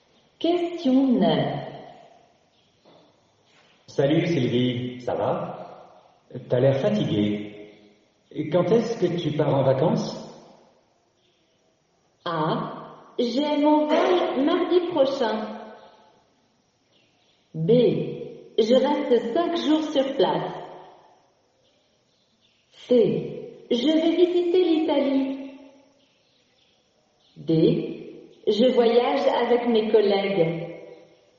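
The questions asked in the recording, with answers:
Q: Quand est-ce que tu pars en vacances?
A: A: J'ai mon vol mardi prochain.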